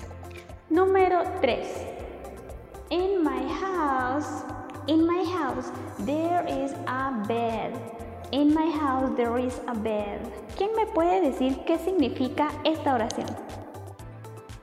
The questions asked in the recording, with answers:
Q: ¿Quién me puede decir qué significa esta oración?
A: En mi casa hay una cama.